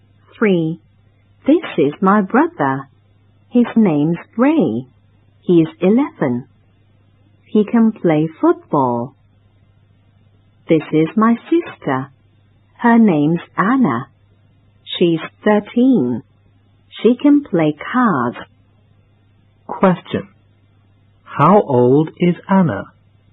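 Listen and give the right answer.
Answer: 13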